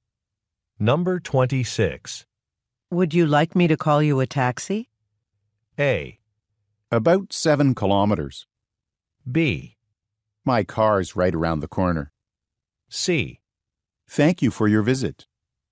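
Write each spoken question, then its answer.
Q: Would you like me to call you a taxi?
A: B: My car's right around the corner.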